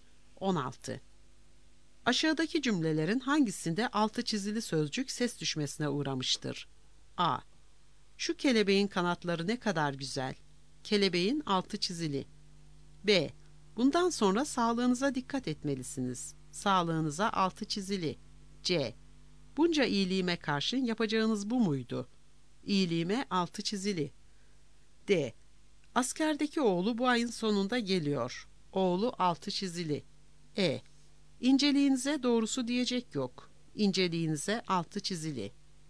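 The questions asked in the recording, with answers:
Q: Aşağıdaki cümlelerin hangisinde altı çizili sözcük ses düşmesine uğramıştır?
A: D: Askerdeki oğlu bu ayın sonunda geliyor.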